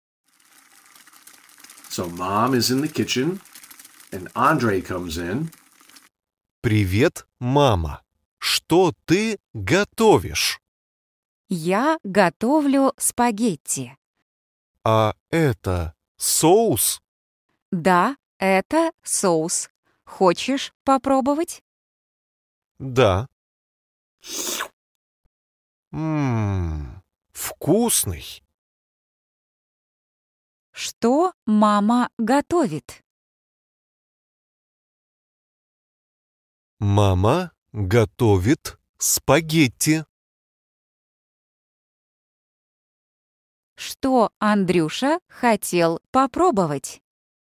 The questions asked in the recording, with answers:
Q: Что мама готовит?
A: Мама готовит спагетти.